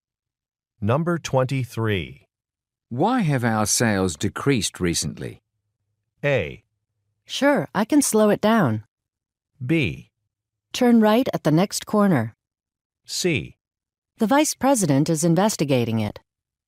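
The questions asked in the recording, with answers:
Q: Why have our sales decreased recently?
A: C: The vice president is investigating it.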